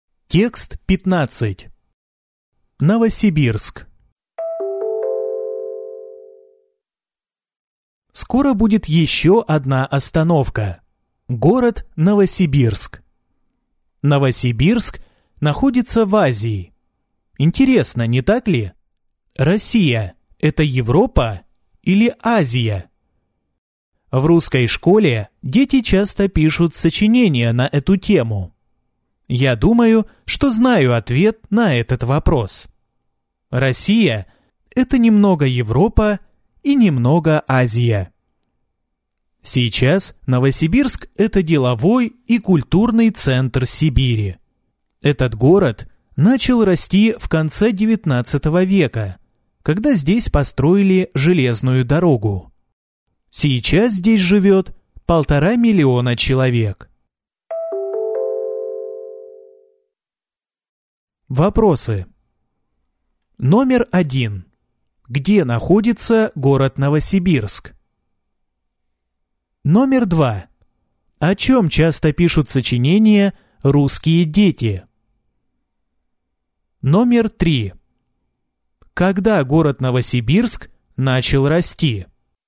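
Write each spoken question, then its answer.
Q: Где находится город Новосибирск?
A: В Азии

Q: О чем часто пишут сочинения русские дети?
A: Россия – это Европа или Азия

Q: Когда город Новосибирск начал расти?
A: В конце XIX века, когда построили железную дорогу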